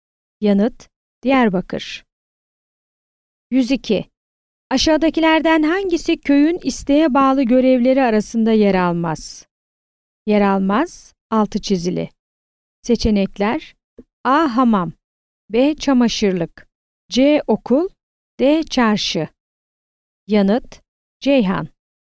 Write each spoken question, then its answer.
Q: Aşağıdakilerden hangisi köyün isteğe bağlı görevleri arasında yer almaz?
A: Yanıt: Ceyhan.